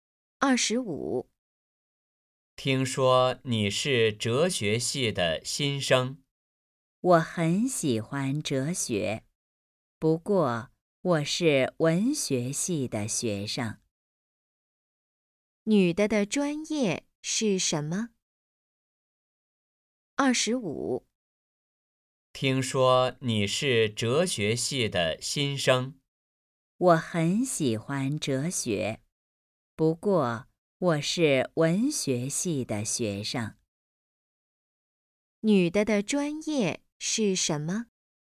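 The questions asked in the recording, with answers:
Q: 女的的专业是什么?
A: 文学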